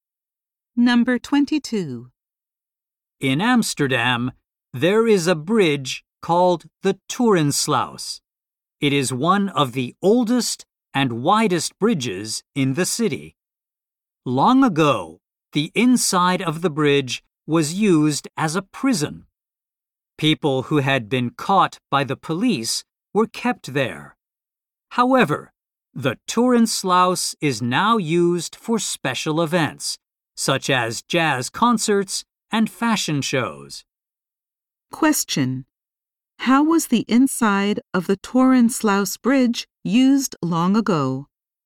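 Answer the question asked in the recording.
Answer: As a prison.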